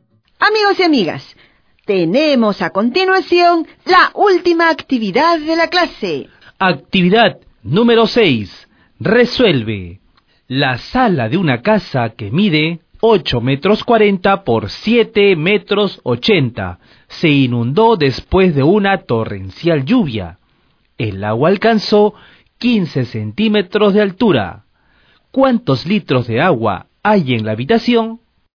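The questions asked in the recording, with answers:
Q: ¿Cuántos litros de agua hay en la habitación?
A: 9828 litros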